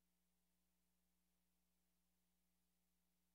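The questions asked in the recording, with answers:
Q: What does the woman mean?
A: They need to find a different parking place.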